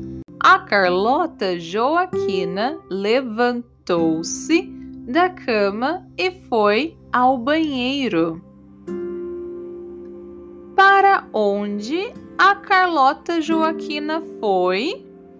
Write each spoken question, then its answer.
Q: Para onde a Carlota Joaquina foi?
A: ao banheiro. A Carlota Joaquina foi ao banheiro.